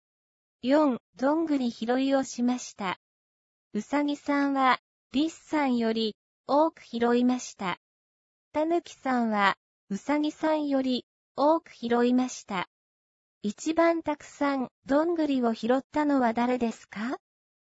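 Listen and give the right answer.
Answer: たぬきさん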